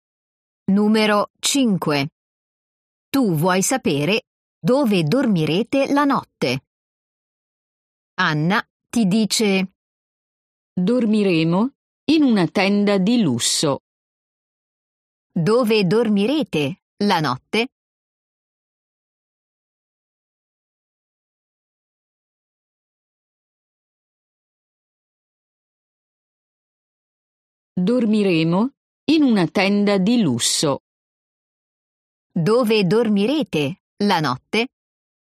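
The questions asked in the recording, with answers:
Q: Dove dormirete la notte?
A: In una tenda di lusso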